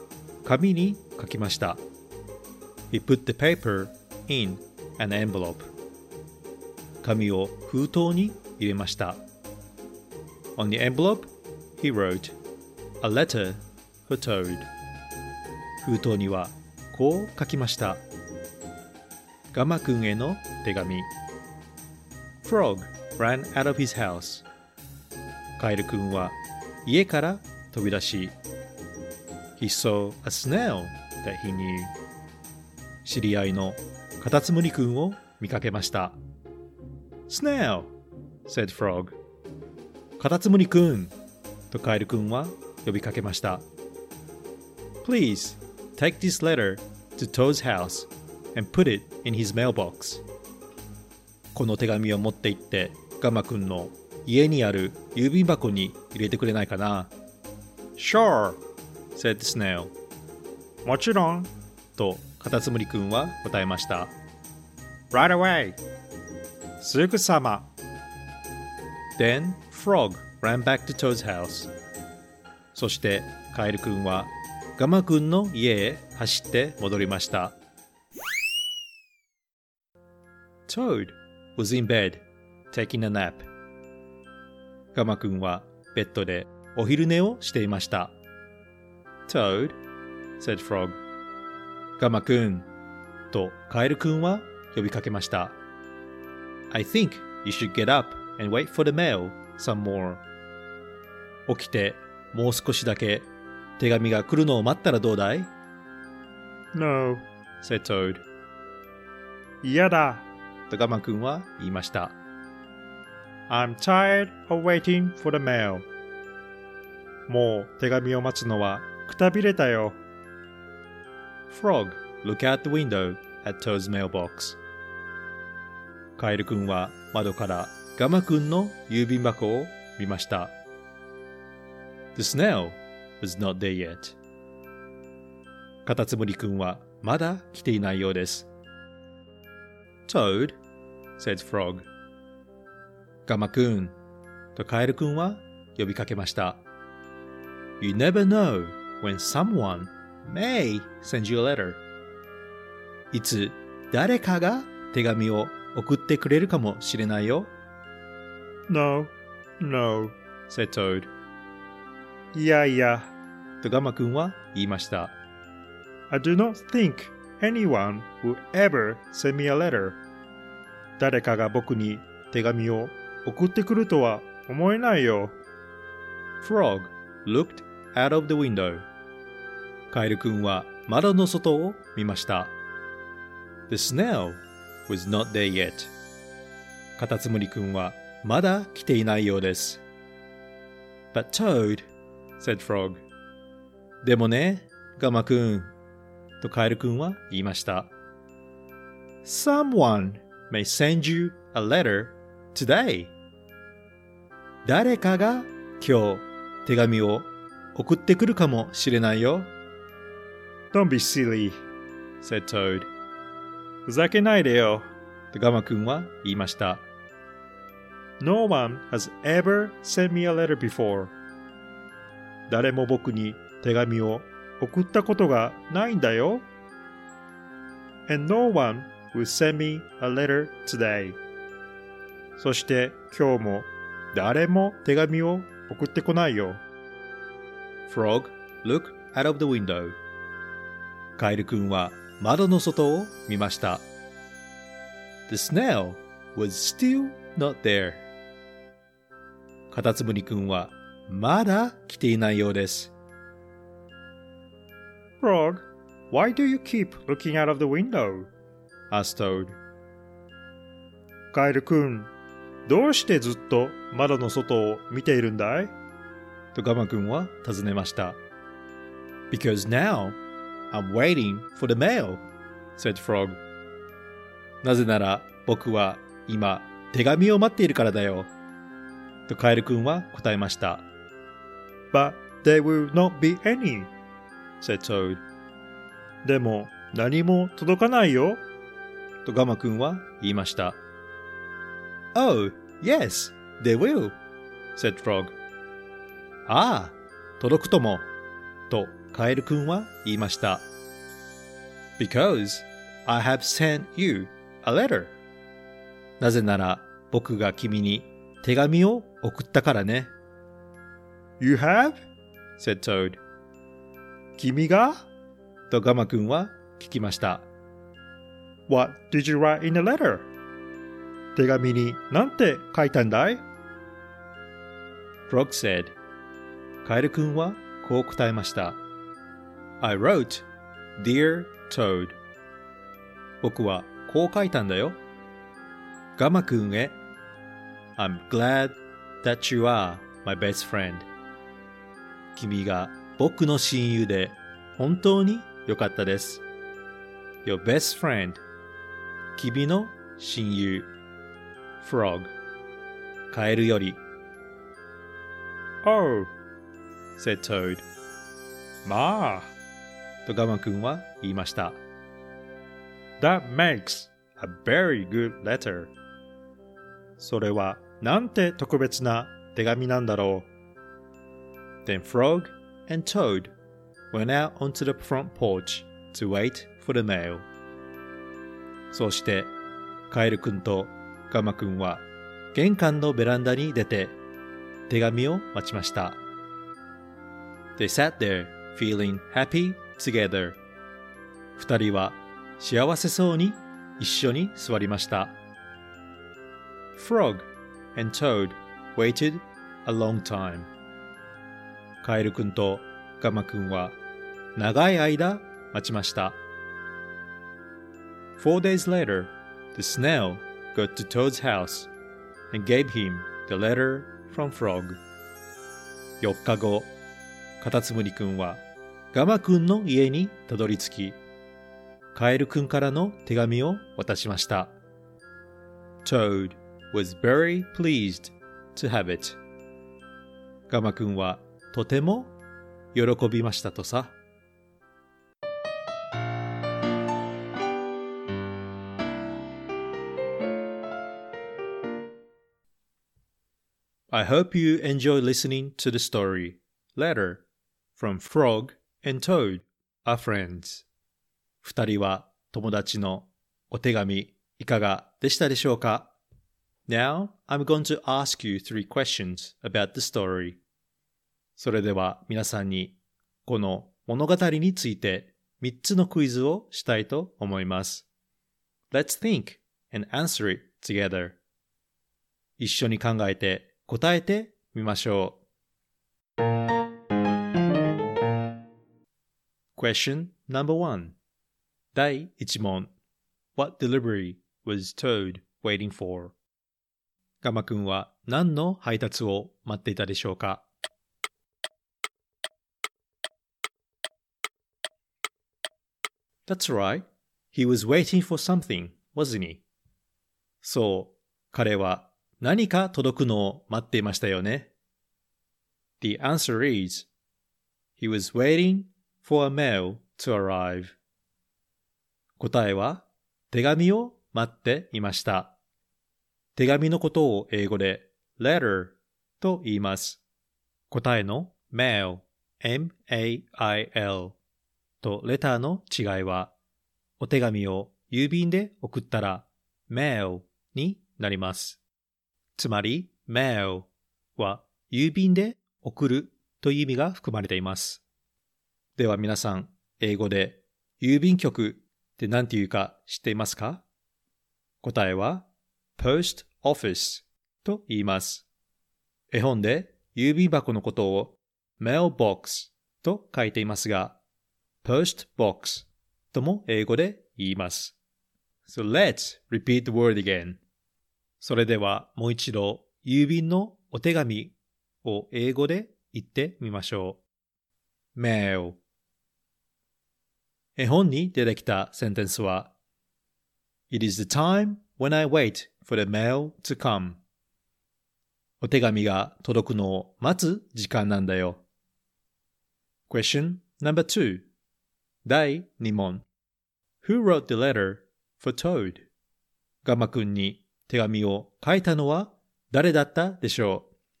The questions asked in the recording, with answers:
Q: Who wrote the letter for Toad?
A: The answer is frog.